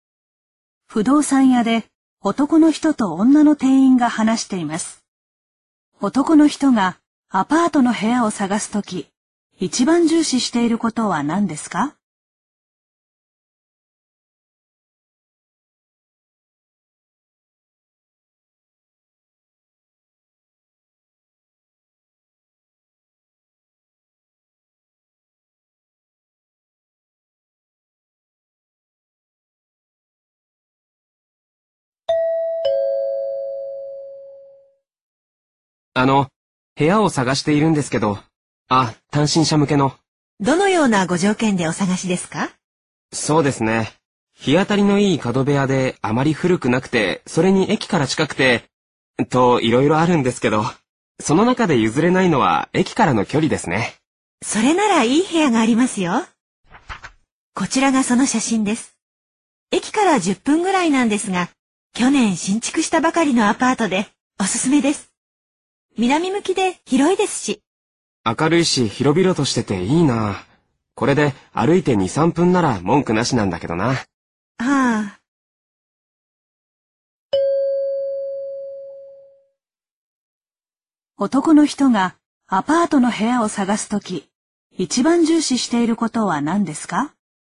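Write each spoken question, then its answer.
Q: 男の人がアパートの部屋を探すとき、一番重視していることは何ですか?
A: 駅からの距離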